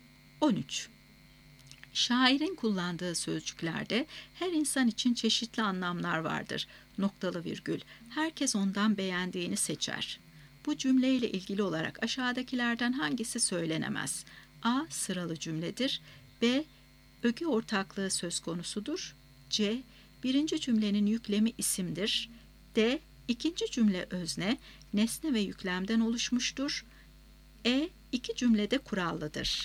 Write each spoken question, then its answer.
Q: Bu cümleyle ilgili olarak aşağıdakilerden hangisi söylenemez?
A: Doğru cevap B şıkkı. Öge ortaklığı söz konusudur.